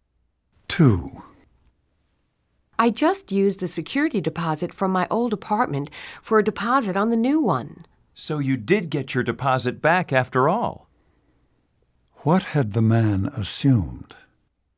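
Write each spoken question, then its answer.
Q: What had the man assumed?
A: That the woman would not get her deposit back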